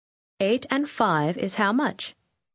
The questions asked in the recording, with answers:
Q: 8 and 5 is how much?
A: 13.